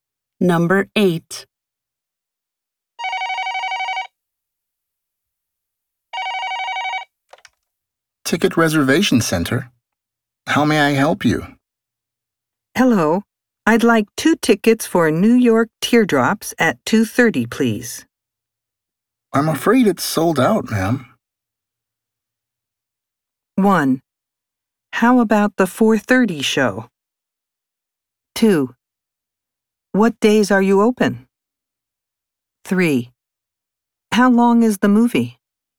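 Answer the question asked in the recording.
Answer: 1: How about the 4:30 show?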